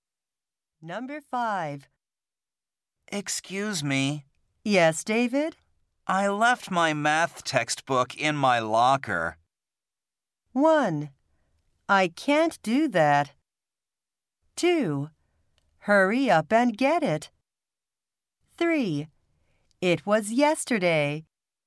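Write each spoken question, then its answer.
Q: I left my math textbook in my locker.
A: 2: Hurry up and get it.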